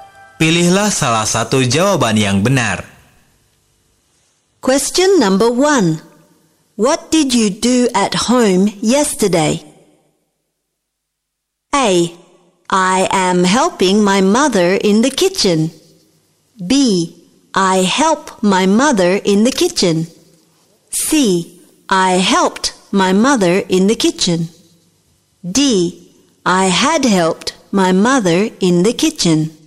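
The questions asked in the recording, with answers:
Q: What did you do at home yesterday?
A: C: I helped my mother in the kitchen.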